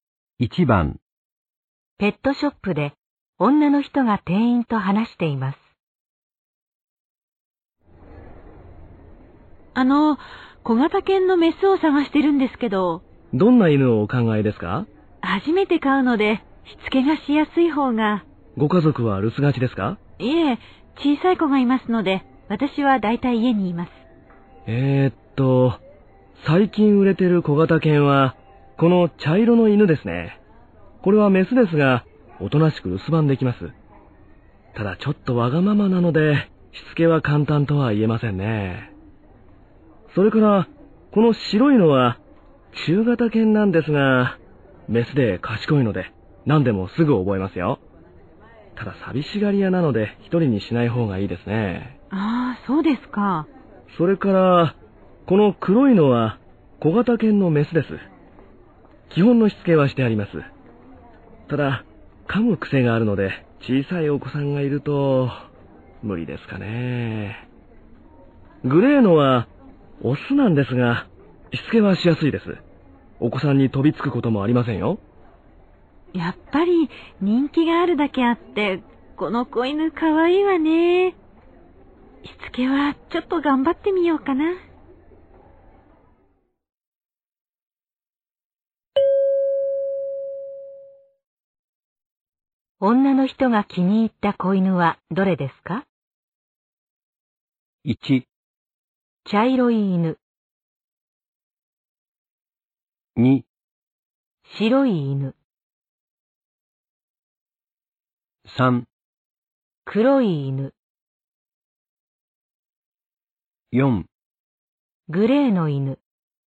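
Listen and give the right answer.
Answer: 1: 茶色い犬。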